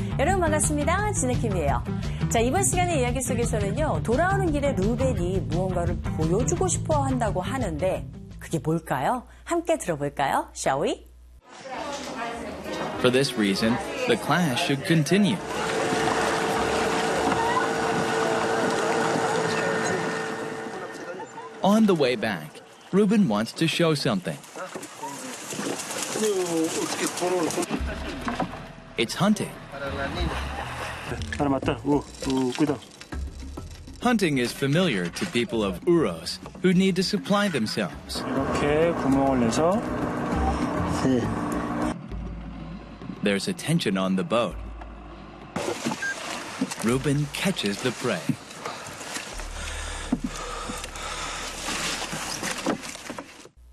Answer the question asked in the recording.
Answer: It's hunting. 사냥을 보여주길 원한 모양이에요.